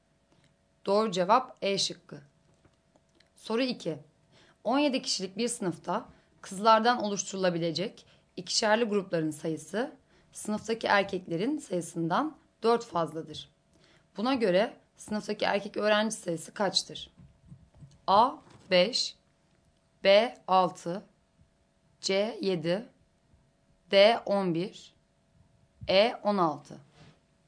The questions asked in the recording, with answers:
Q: Buna göre sınıftaki erkek öğrenci sayısı kaçtır?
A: Doğru cevap D şıkkı.